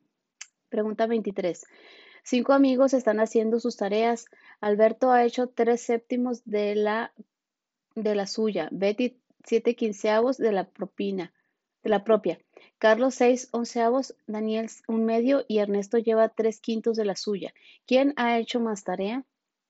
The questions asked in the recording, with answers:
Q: ¿Quién ha hecho más tarea?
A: Y la respuesta correcta es Ernesto.